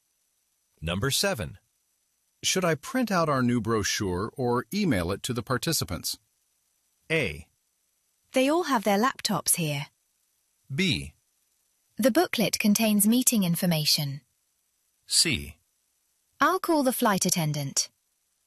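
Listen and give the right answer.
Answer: A: They all have their laptops here.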